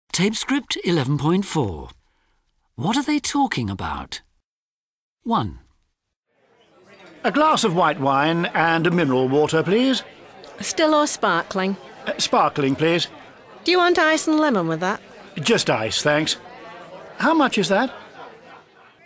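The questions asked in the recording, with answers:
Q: What are they talking about?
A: ordering drinks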